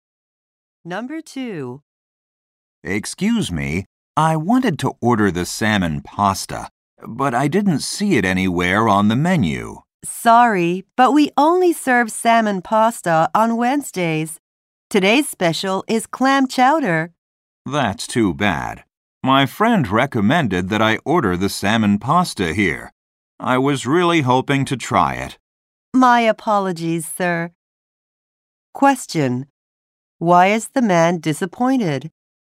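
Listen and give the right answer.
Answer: Salmon pasta is only served on Wednesdays, so he can't order it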